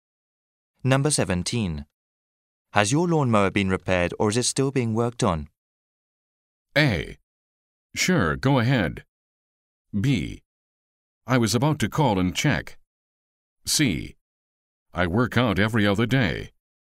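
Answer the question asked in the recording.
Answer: B: I was about to call and check.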